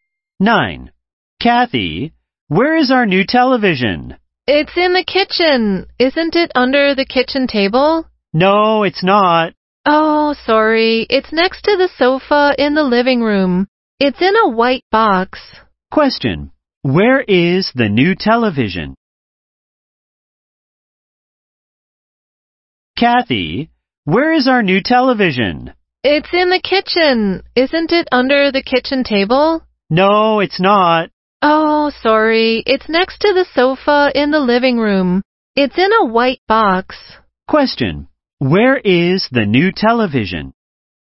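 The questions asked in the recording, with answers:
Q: Where is the new television?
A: Next to the sofa in the living room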